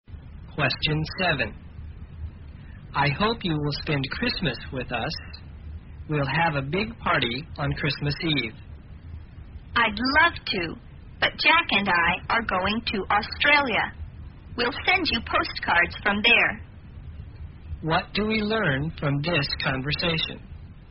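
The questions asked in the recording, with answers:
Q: What do we learn from this conversation?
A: She can't spend Christmas with them because she and Jack are going to Australia.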